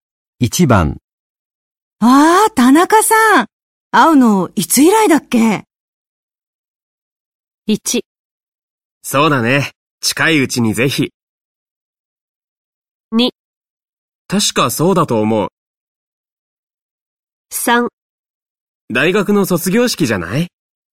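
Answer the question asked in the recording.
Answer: 3: 大学の卒業式じゃない?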